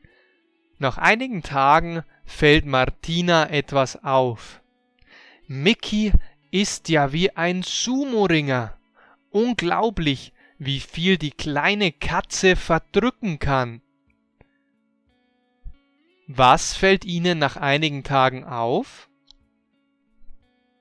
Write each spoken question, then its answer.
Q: Was fällt ihnen nach einigen Tagen auf?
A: Ihnen fällt auf, wie viel die kleine Katze verdrücken, also essen kann.